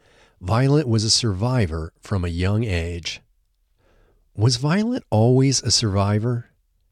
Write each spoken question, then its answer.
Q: Was Violet always a survivor?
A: Yes, she was a survivor from a young age.